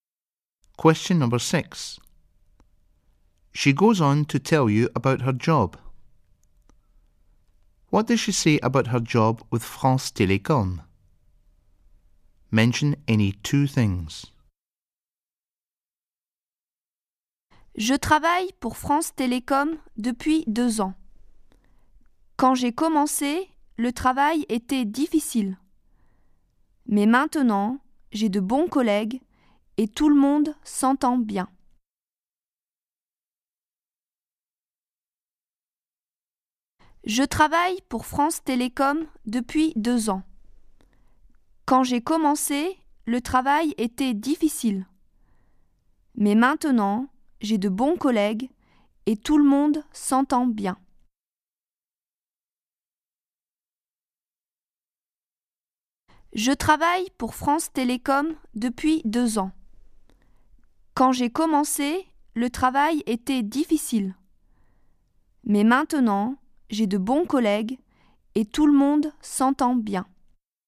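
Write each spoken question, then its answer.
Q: What does she say about her job with France Télécom?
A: She has worked there for 2 years; at first the work was difficult; now she has good colleagues and everyone gets on well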